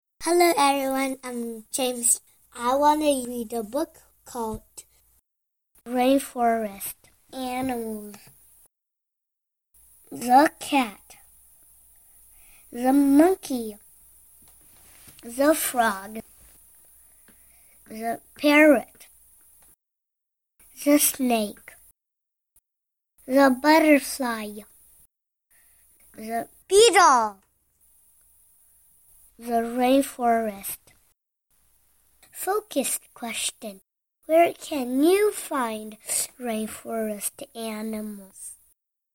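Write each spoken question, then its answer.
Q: Where can you find rainforest animals?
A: In the rainforest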